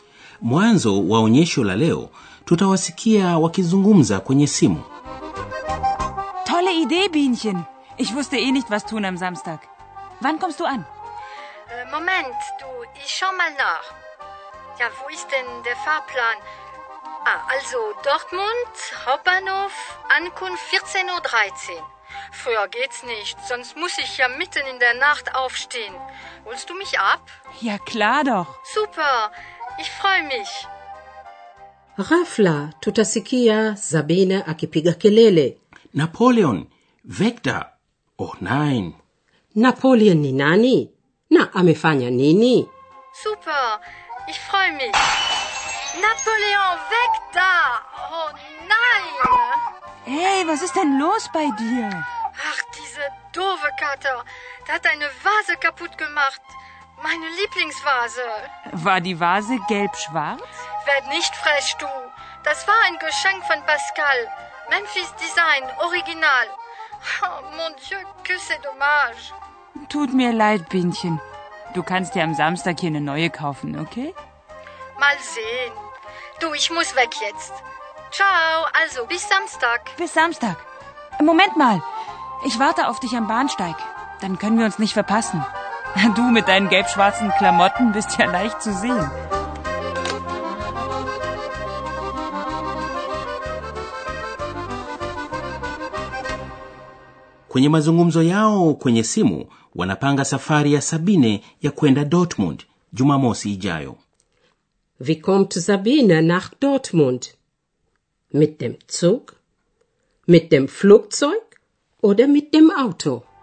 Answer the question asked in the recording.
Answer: Sabine atafika Jumamosi ijayo kwa treni na atafikia kwenye stesheni kuu ya Dortmund.